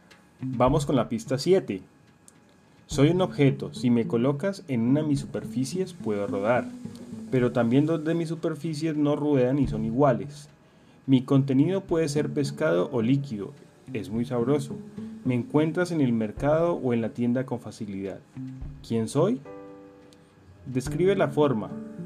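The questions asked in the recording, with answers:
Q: ¿Quién soy?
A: una lata (de atún o bebida)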